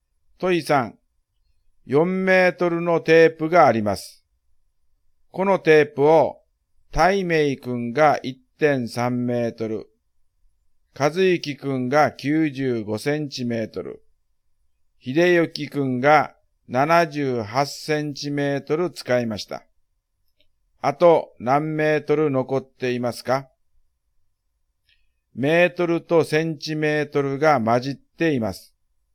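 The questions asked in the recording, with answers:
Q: あと何メートル残っていますか?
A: 0.97メートル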